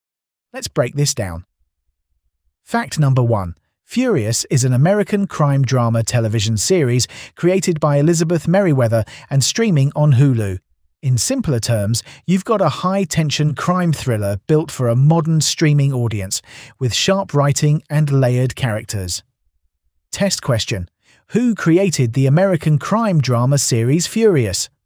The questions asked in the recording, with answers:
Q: Who created the American crime drama series Furious?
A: Elizabeth Merriweather.